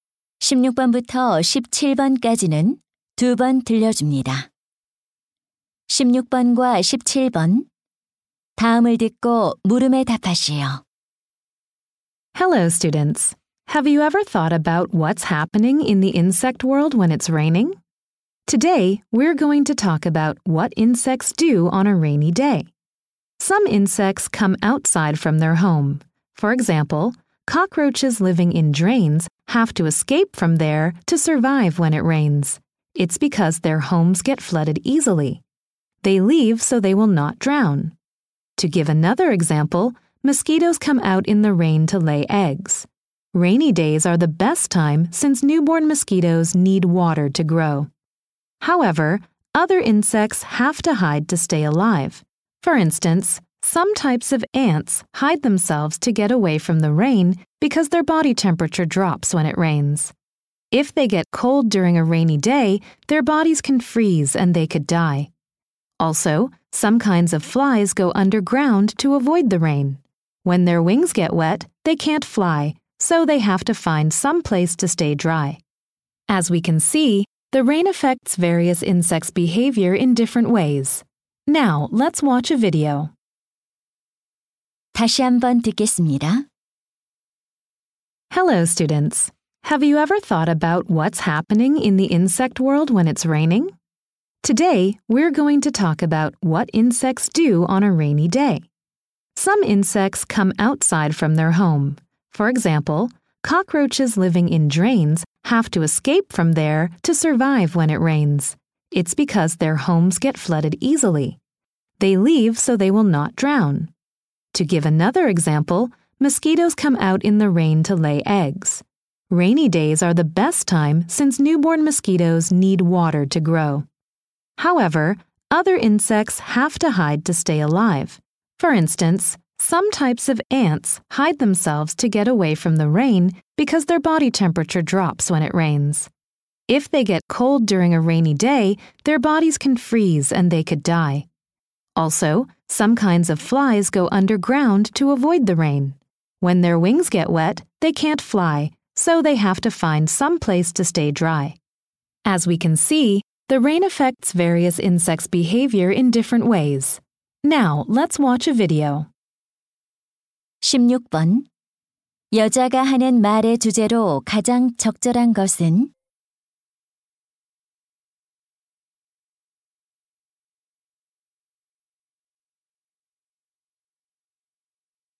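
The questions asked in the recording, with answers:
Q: 여자가 하는 말의 주제로 가장 적절한 것은?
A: 비가 곤충의 행동에 미치는 다양한 영향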